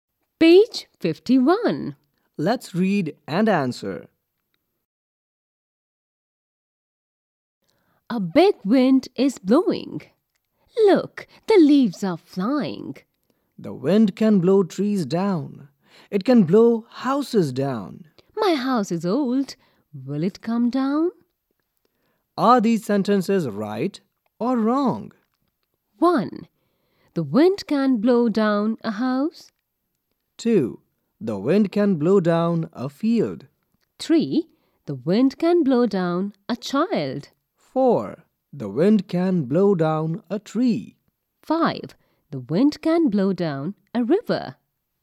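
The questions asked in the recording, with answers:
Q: The wind can blow down a house.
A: Right

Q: The wind can blow down a tree.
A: Right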